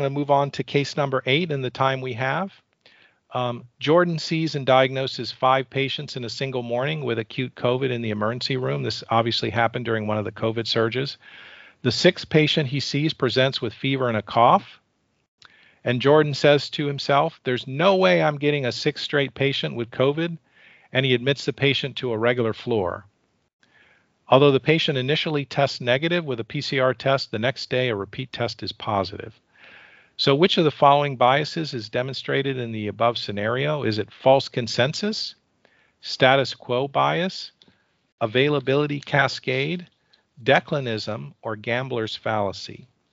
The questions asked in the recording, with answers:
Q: So which of the following biases is demonstrated in the above scenario?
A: this is the answer here is a gambler's fallacy.